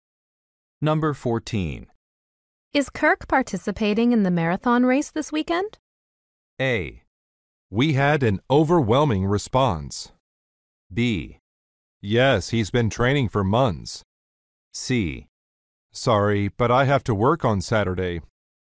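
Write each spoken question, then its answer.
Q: Is Kirk participating in the marathon race this weekend?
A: B: Yes, he's been training for months.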